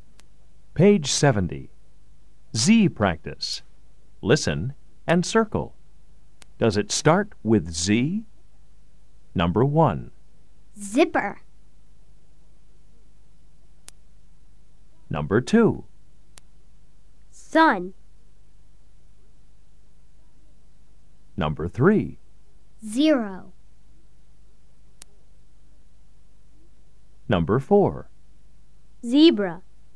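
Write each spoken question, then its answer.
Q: Does it start with Z?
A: Yes (zipper)

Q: Does it start with Z?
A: No (sun)

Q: Does it start with Z?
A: Yes (zero)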